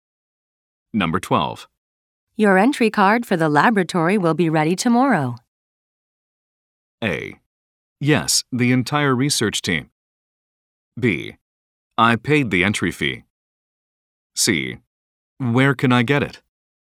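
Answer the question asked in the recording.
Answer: C: Where can I get it?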